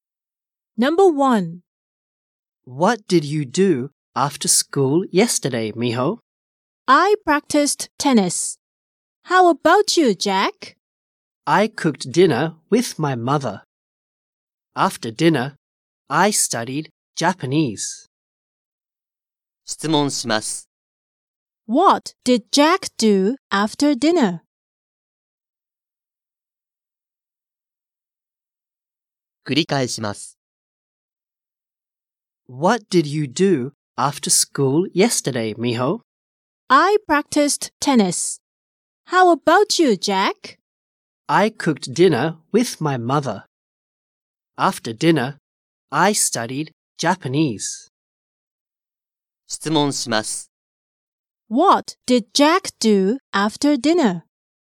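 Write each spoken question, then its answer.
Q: What did Jack do after dinner?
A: He studied Japanese.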